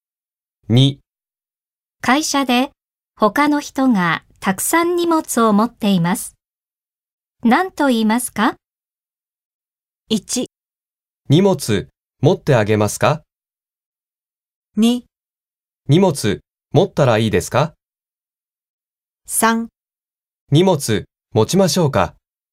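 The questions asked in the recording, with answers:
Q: 会社で他の人がたくさん荷物を持っています。何と言いますか?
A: 3: 荷物持ちましょうか?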